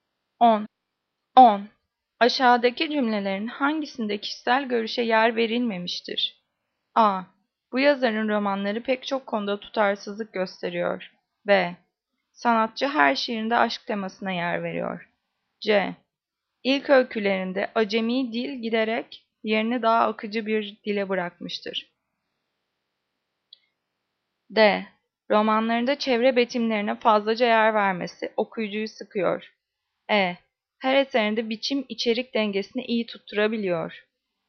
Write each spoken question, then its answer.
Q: Aşağıdaki cümlelerin hangisinde kişisel görüşe yer verilmemiştir?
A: Cevap B. Sanatçı her şiirinde aşk temasına yer veriyor.